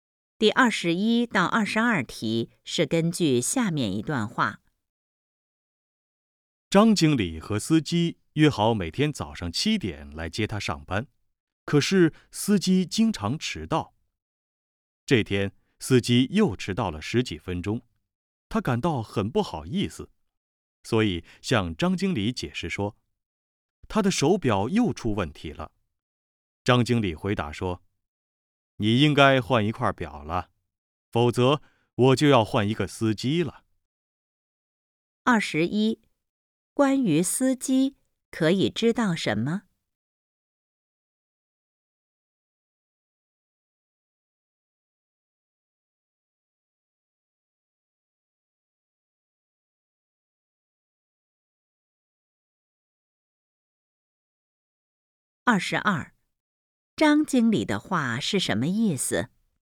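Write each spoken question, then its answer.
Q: 关于司机,可以知道什么?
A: 经常迟到

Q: 张经理的话是什么意思?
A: 再迟到就换司机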